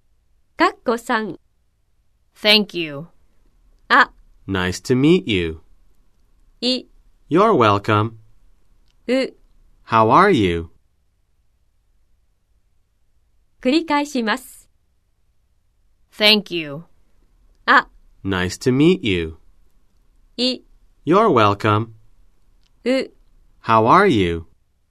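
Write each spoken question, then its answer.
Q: Thank you.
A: い: You're welcome.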